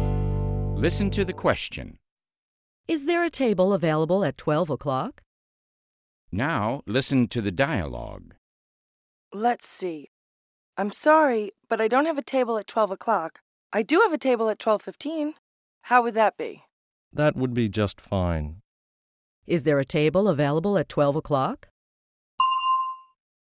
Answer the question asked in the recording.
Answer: No, there isn't a table available at 12 o'clock, but there is one available at 12:15.